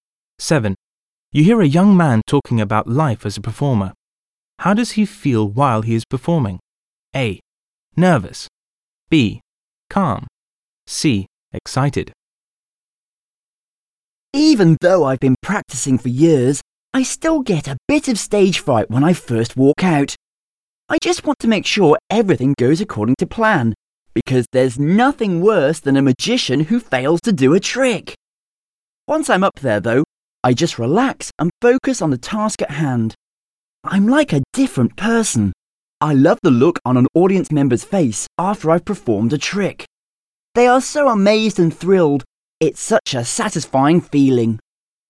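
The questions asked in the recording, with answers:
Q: How does he feel while he is performing?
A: B: Calm.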